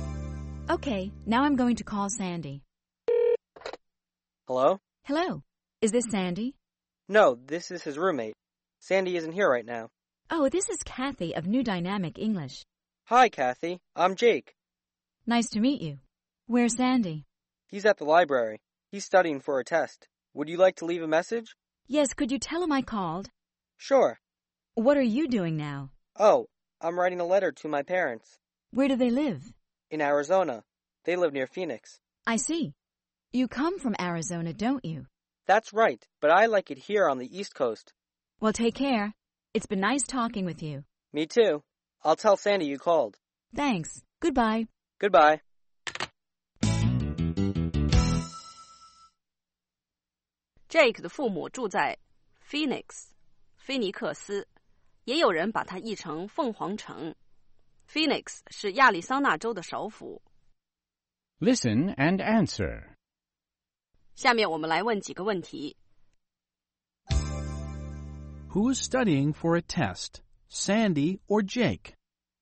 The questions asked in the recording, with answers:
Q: Who's studying for a test, Sandy or Jake?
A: Sandy is.